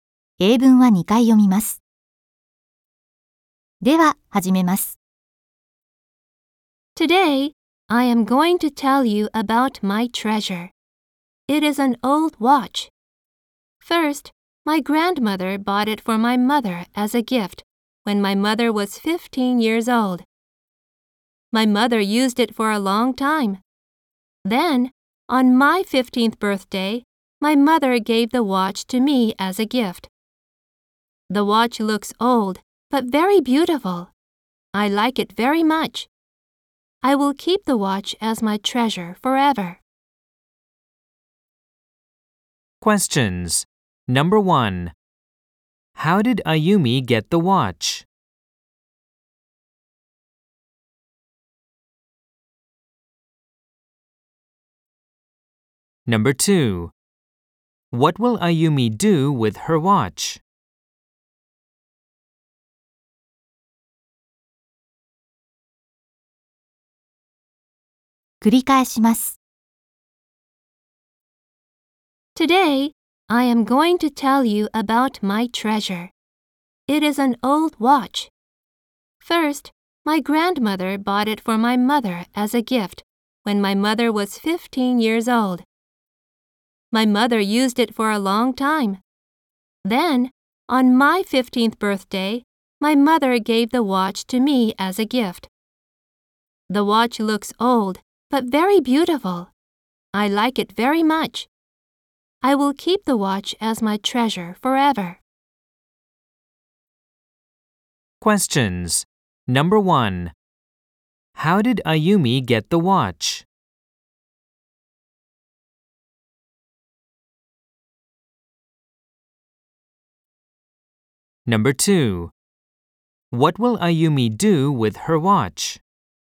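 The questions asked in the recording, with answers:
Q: How did Ayumi get the watch?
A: Her mother gave it to her as a gift on her 15th birthday.

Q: What will Ayumi do with her watch?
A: She will keep it as her treasure forever.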